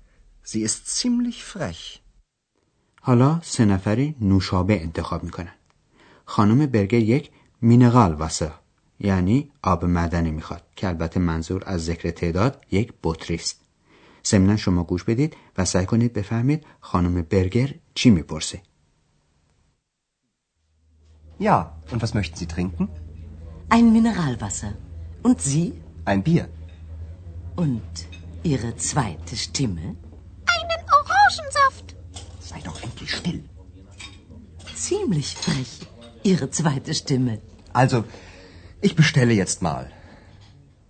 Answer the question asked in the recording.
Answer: خانم برگر با لحنی کنایه‌آمیز میپرسه که دیشتیمه یعنی صدا و در واقع یعنی اکس چه می نوشه جمله خانم برگر اینه صدای دوم شما چی؟